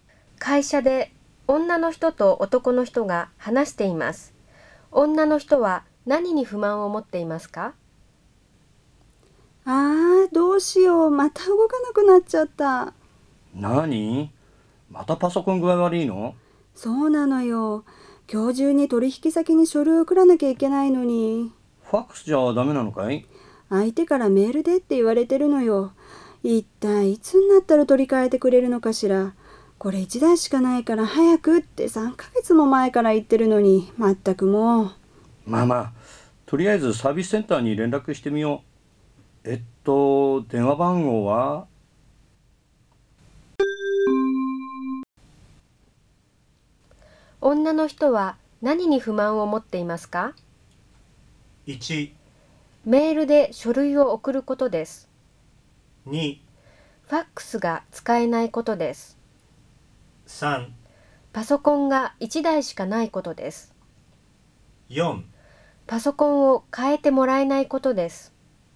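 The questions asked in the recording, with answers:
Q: 女の人は何に不満を持っていますか?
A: 4: パソコンを変えてもらえないことです。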